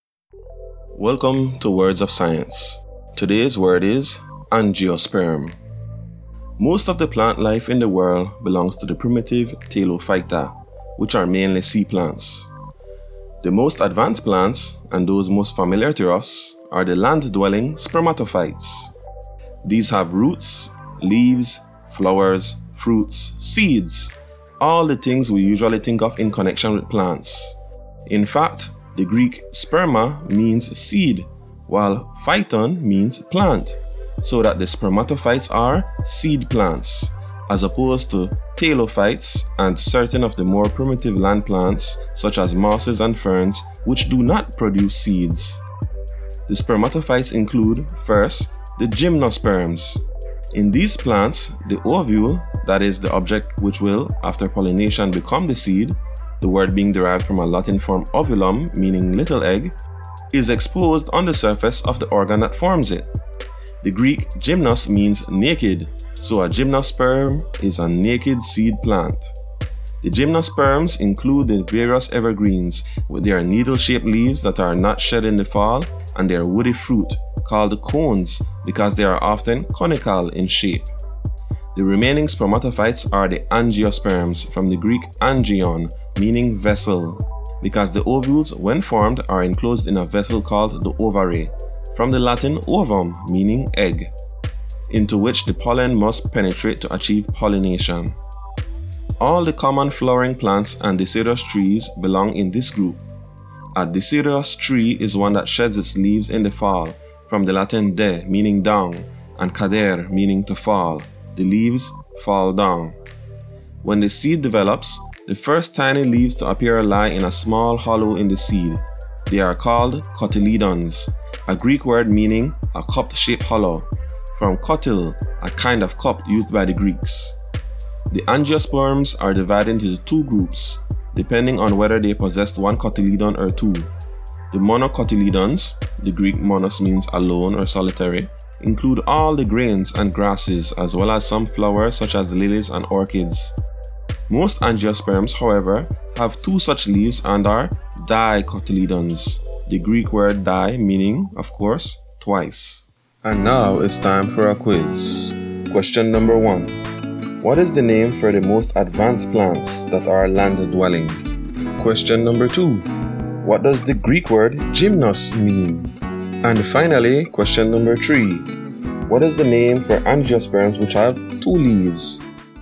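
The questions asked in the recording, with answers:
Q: What is the name for the most advanced plants that are land-dwelling?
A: spermatophytes

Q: What does the Greek word gymnos mean?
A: naked

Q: What is the name for angiosperms which have two leaves?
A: dicotyledons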